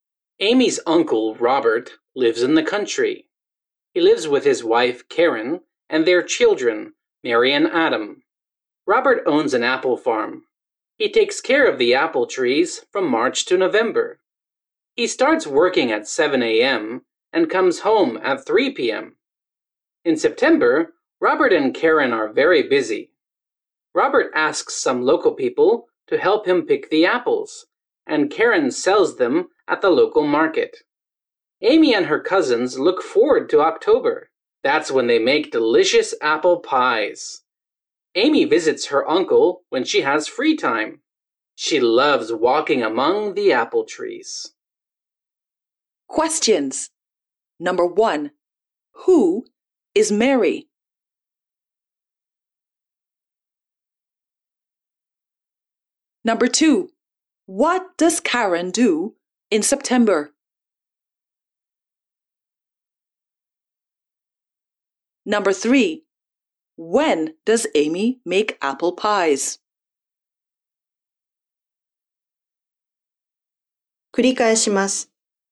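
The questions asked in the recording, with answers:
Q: who is Mary?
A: Amy's cousin (Robert's daughter)

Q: what does Karen do in September?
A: She sells apples at the local market.

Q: When does Amy make apple pies?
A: In October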